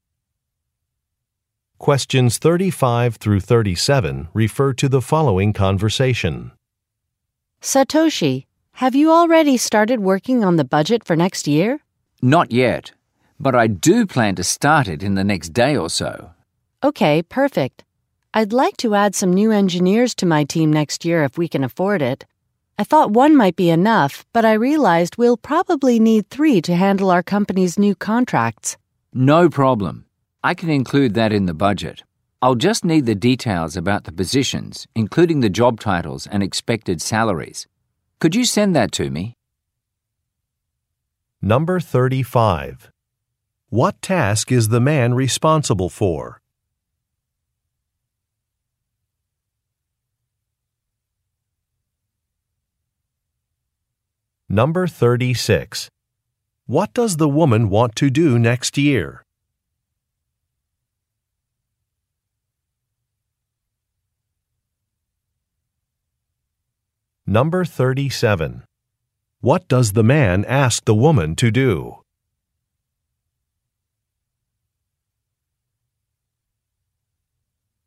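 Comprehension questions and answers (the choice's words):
Question 35 - 37 refer to following conversation:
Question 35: What task is the man responsible for?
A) Writing a budget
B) Reviewing job applications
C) Organizing a company newsletter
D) Updating an employee handbook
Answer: Writing a budget

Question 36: What does the woman want to do next year?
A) Organize a trade show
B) Open a new store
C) Redesign a product catalog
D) Hire some team members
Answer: Hire some team members

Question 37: What does the man ask the woman to do?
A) Order some business cards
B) Write a press release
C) Provide some additional details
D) Set up a meeting time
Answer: Provide some additional details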